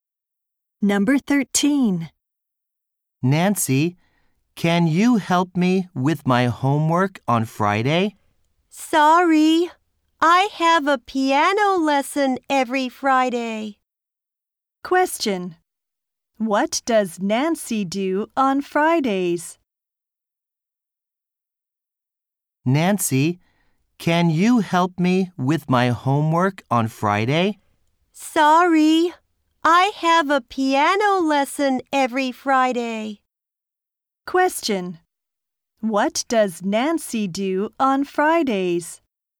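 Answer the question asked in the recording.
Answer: She has a piano lesson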